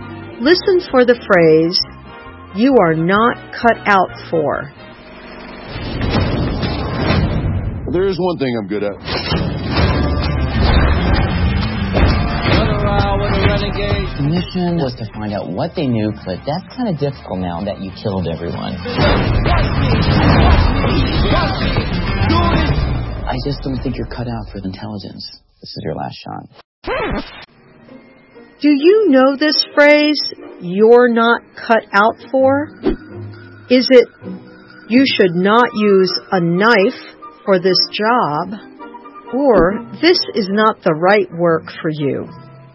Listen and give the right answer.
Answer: You're not cut out for means this is not the right work for you.